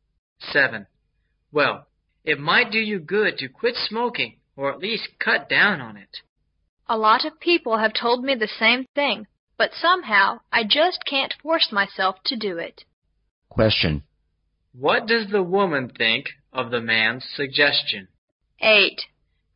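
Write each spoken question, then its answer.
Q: What does the woman think of the man's suggestion?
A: It's good advice, but she can't make herself quit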